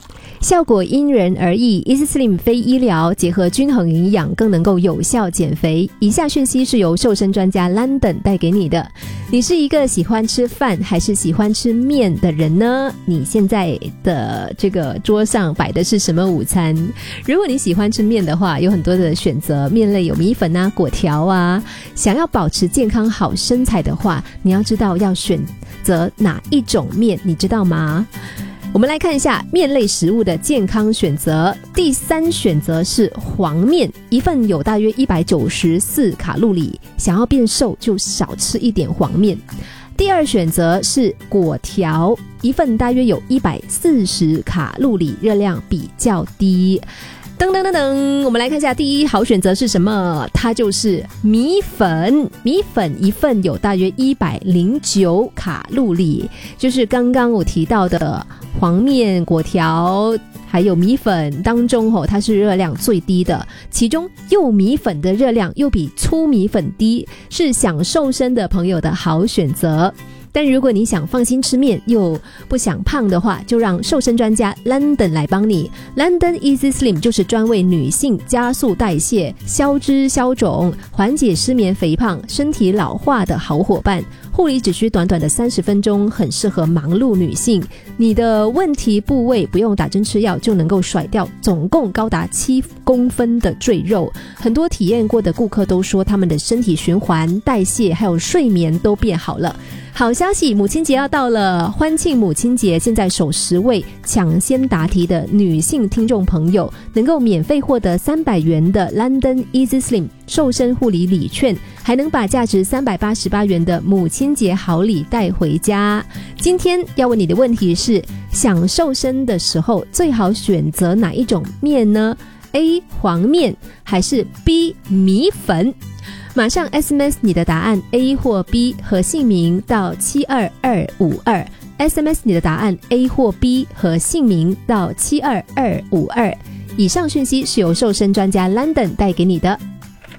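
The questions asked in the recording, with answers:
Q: 今天要问你的问题是,想瘦身的时候最好选择哪一种面呢?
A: B: 米粉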